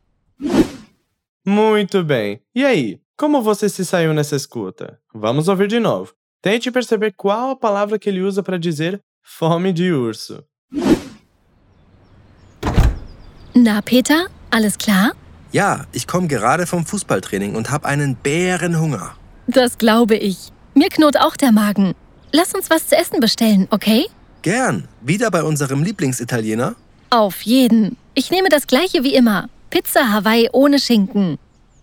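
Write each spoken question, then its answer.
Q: Tente perceber qual a palavra que ele usa para dizer fome de urso.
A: Bärenhunger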